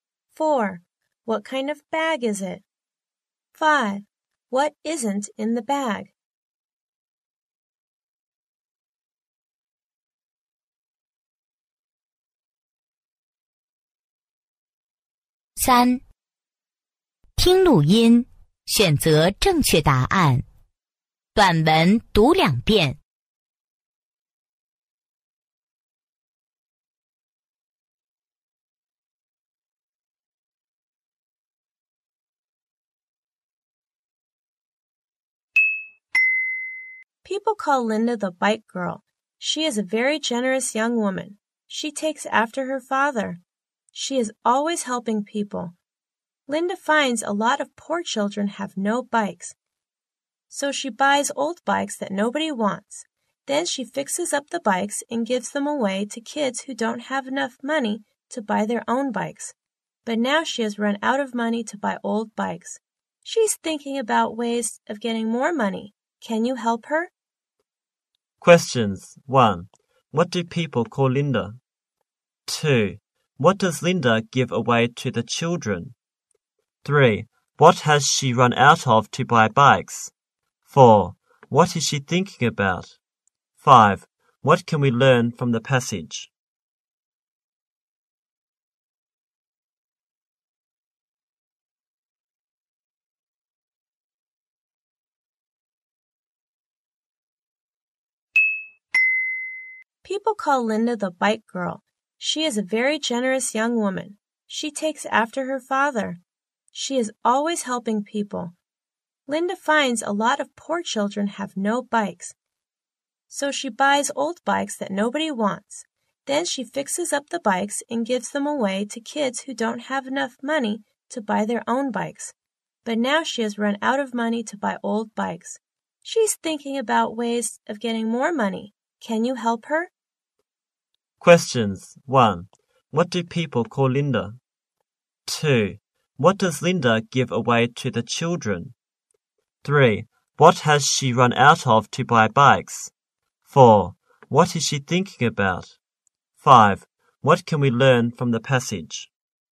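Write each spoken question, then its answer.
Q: What do people call Linda?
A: The bike girl

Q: What does Linda give away to the children?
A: Bikes she has fixed up

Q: What has she run out of to buy bikes?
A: Money

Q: What is she thinking about?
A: Ways of getting more money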